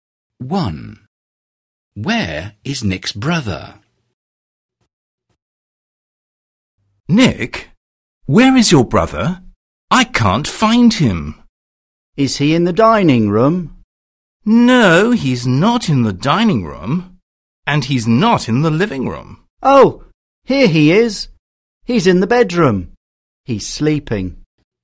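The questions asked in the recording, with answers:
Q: Where is Nick's brother?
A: In the bedroom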